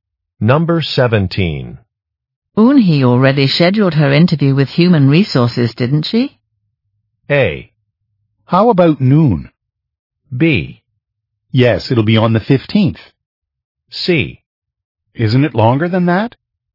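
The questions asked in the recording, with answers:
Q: Eunhee already scheduled her interview with Human Resources, didn't she?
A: B: Yes, it'll be on the 15th.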